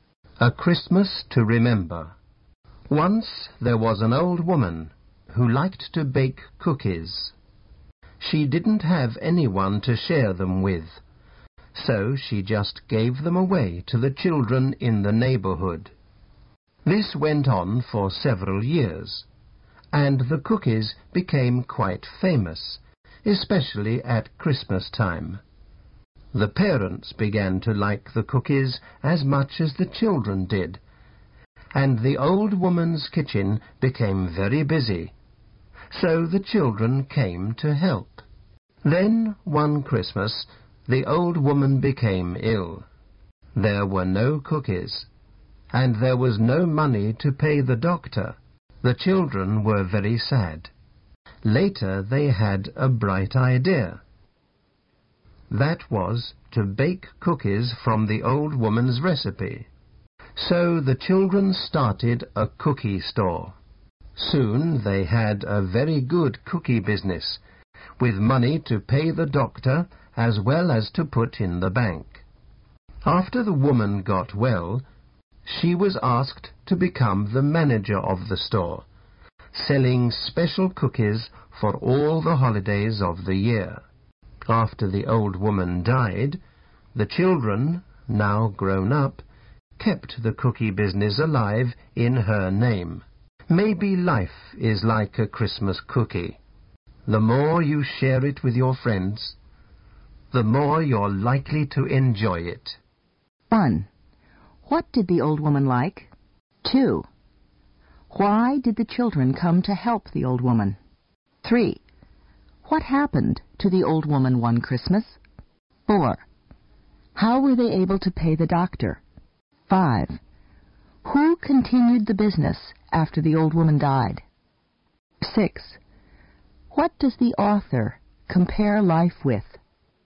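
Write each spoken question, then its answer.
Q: What did the old woman like?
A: Baking cookies

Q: Why did the children come to help the old woman?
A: Her kitchen became very busy

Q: What happened to the old woman one Christmas?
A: She became ill

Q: How were they able to pay the doctor?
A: The children started a cookie store

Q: Who continued the business after the old woman died?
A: The children, now grown up

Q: What does the author compare life with?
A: A Christmas cookie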